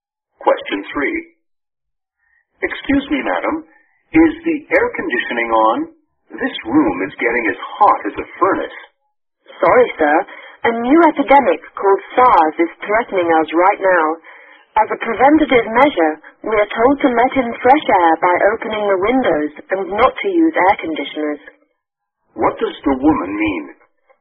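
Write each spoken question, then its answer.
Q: What does the woman mean?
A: The air conditioning is off to help prevent SARS, so they open the windows instead.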